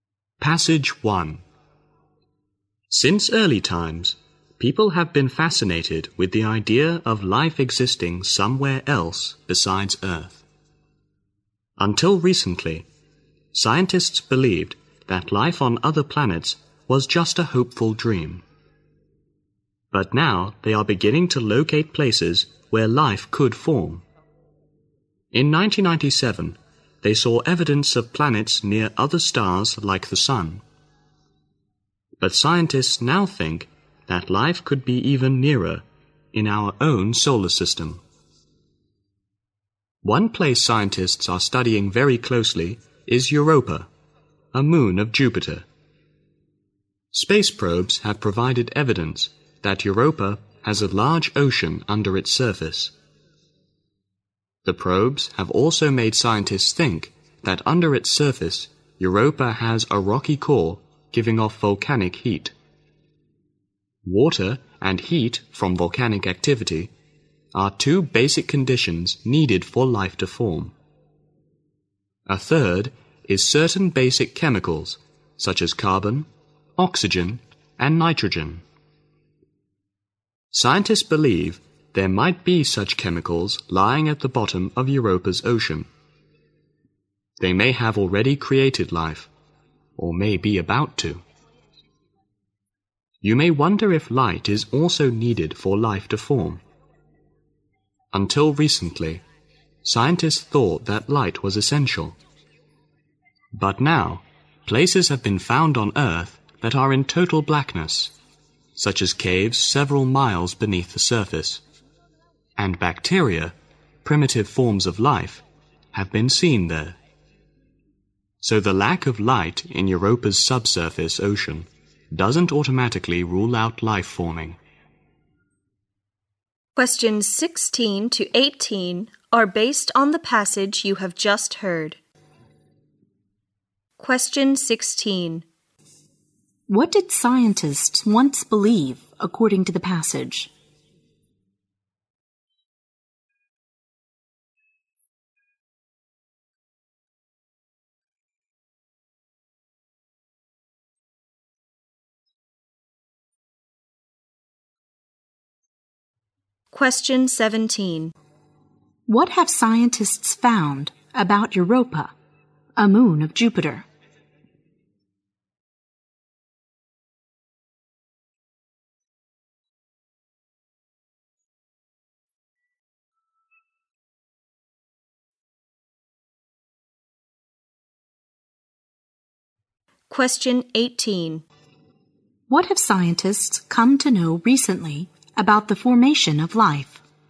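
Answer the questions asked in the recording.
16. Life on other planets was just a hopeful dream
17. It has a large ocean under its surface and possibly a rocky volcanic core
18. Light is not essential for life to form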